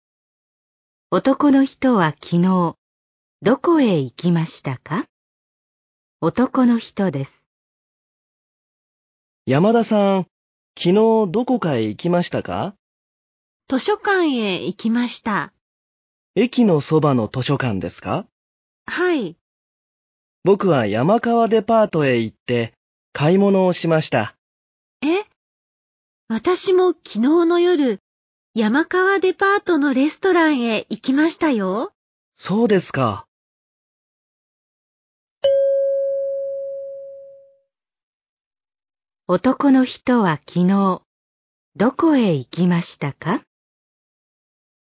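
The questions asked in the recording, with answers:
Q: 男の人は昨日、どこへ行きましたか?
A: 山川デパート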